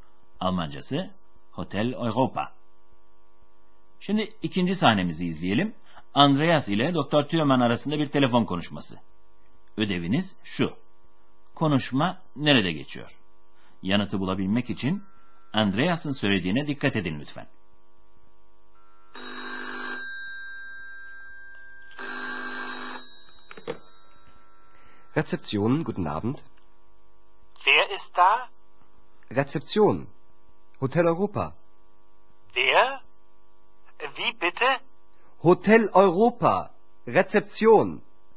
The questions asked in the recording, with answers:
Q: Konuşma nerede geçiyor?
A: Bu sahnede de otelin resepsiyonundaki telefonda Andreas'ın sesini duyduk.